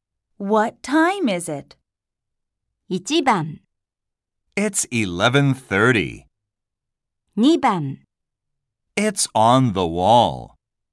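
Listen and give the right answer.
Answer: 1: It's 11:30.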